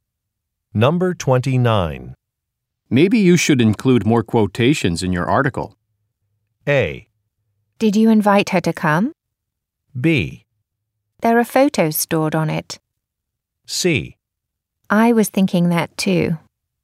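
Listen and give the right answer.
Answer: C: I was thinking that too.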